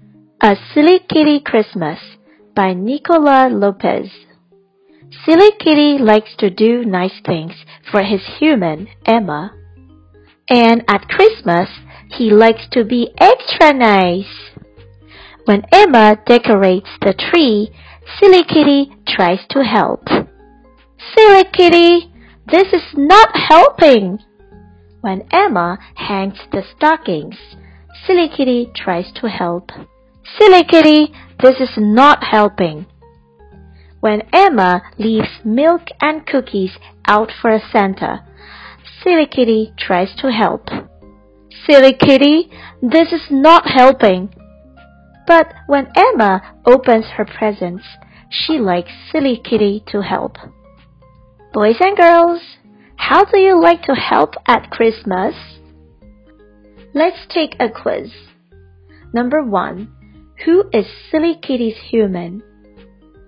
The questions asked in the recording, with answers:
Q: who is Silly Kitty's human?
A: The answer is Emma.